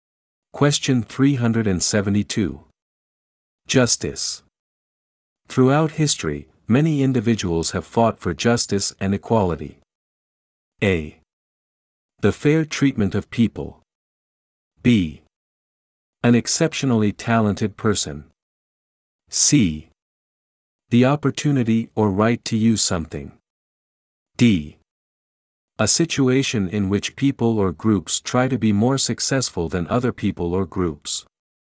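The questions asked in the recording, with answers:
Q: Justice. Throughout history, many individuals have fought for justice and equality.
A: A: The fair treatment of people.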